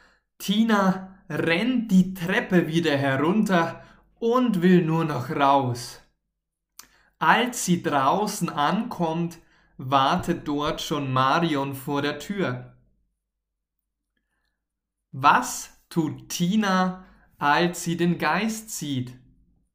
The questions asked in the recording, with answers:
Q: Was tut Tina, als sie den Geist sieht?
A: Sie rennt die